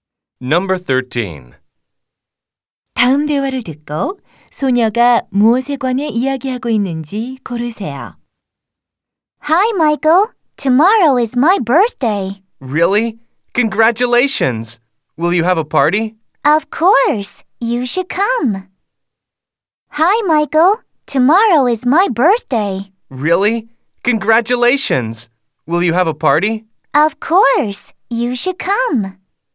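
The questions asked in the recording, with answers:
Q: 다음 대화를 듣고 소녀가 무엇에 관해 이야기하고 있는지 고르세요.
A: 자신의 생일 (생일 파티)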